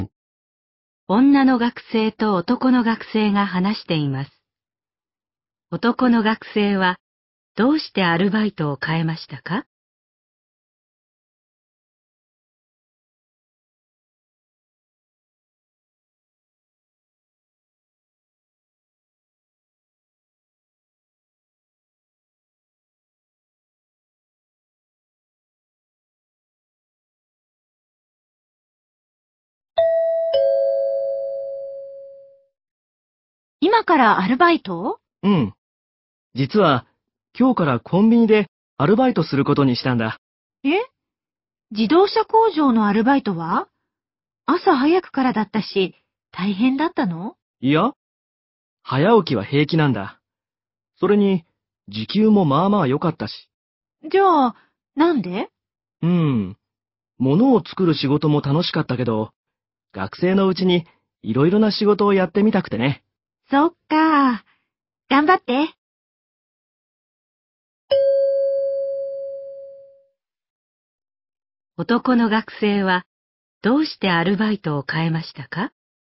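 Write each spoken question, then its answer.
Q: 男の学生はどうしてアルバイトを変えましたか?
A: 学生のうちにいろいろな仕事をやってみたいから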